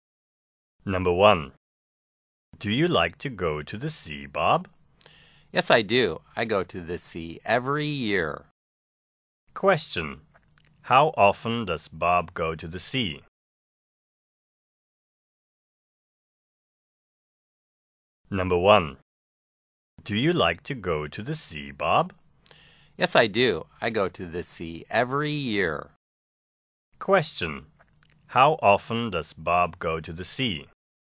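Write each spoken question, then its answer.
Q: How often does Bob go to the sea?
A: Every year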